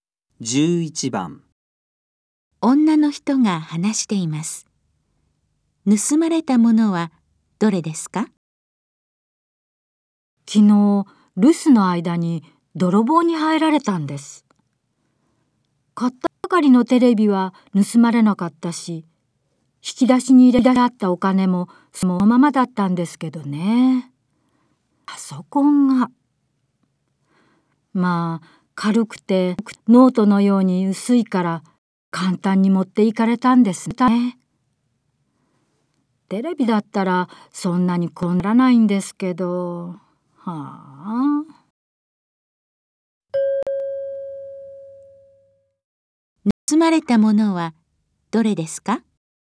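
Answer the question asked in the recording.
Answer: パソコン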